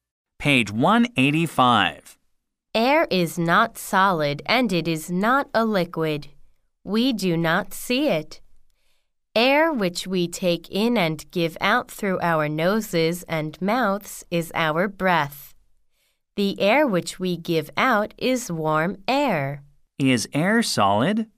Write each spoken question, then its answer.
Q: Is air solid?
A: No, air is not solid.